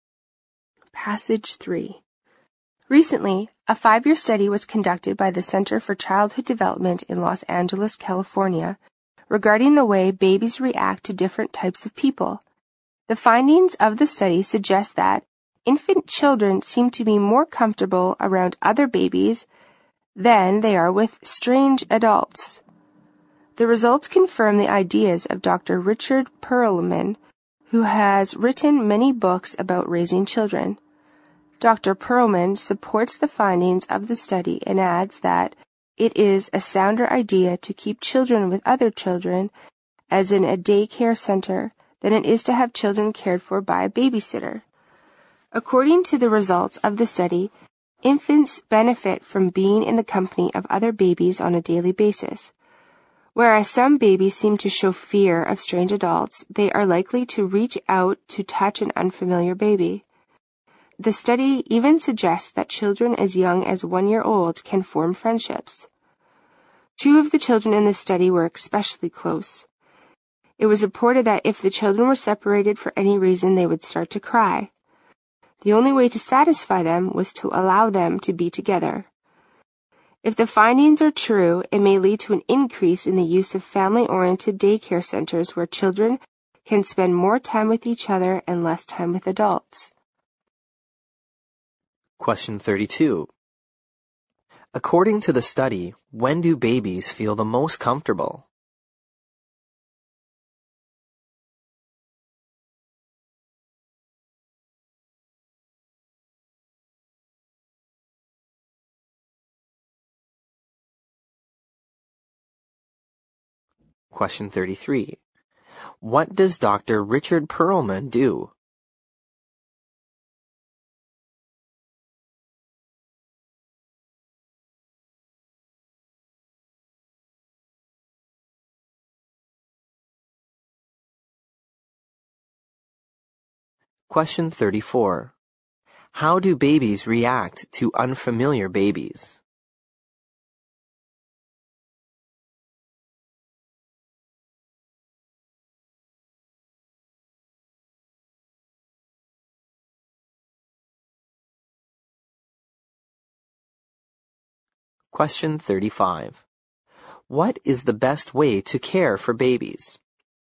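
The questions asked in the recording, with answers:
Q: According to the study, when do babies feel the most comfortable?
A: When they are around other babies

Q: What does Dr. Richard Perlman do?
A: He writes books about raising children

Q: How do babies react to unfamiliar babies?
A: They reach out to touch them

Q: What is the best way to care for babies?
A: Keep them with other children, as in a daycare center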